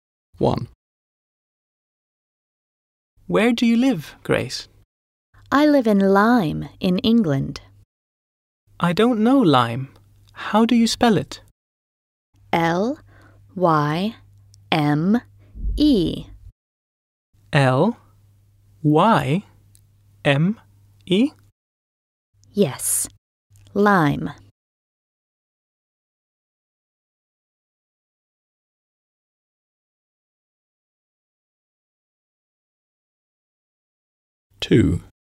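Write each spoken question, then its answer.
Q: Where do you live, Grace?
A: Lyme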